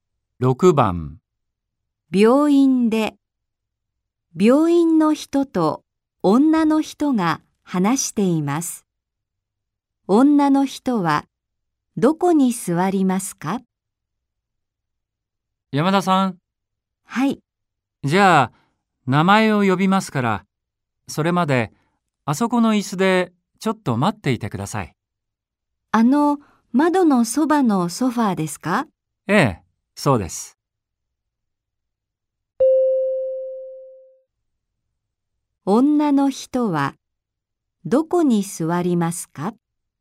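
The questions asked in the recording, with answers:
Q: 女の人はどこに座りますか?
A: 窓のそばのソファー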